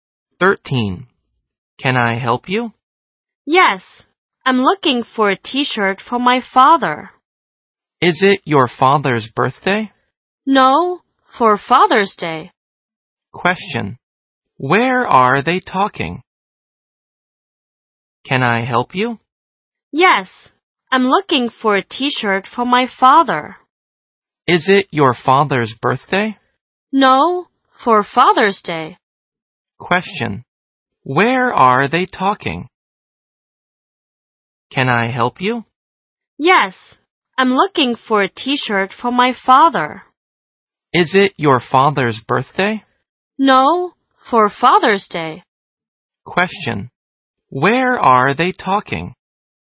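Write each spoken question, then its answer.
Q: Where are they talking?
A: In a clothes store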